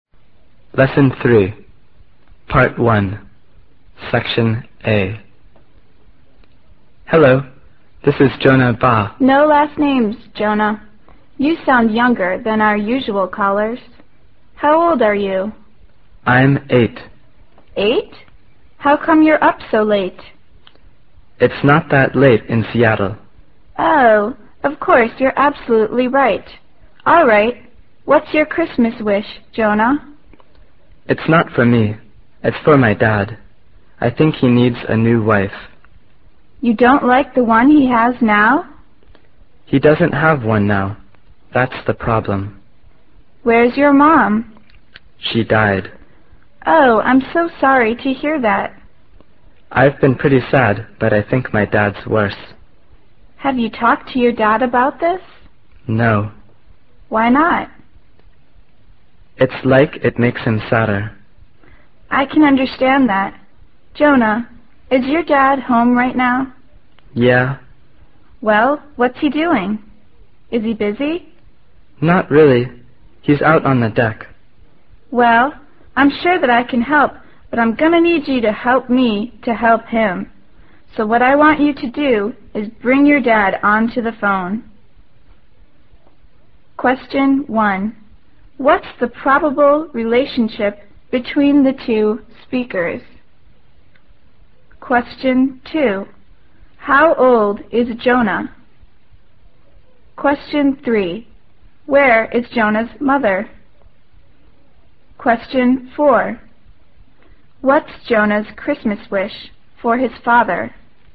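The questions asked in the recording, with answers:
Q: Where is Jonah's mother?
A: She died.

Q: What's Jonah's Christmas wish for his father?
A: A new wife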